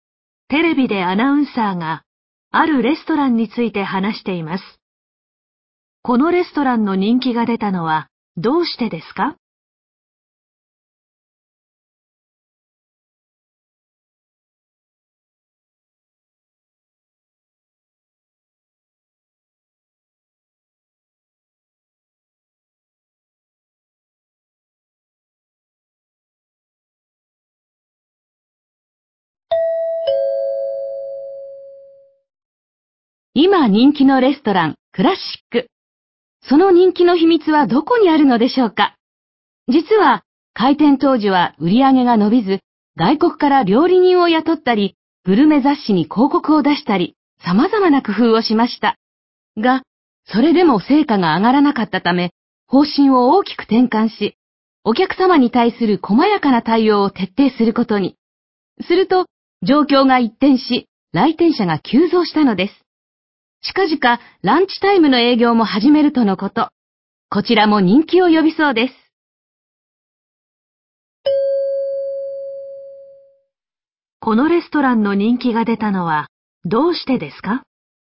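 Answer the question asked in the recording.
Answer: お客様に対する細やかな対応を徹底したから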